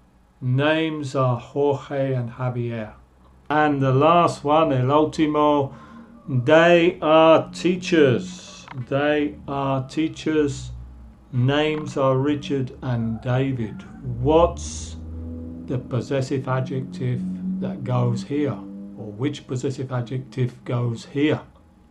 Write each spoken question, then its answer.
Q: Or which possessive adjective goes here?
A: they are teachers, their names are Richard and David.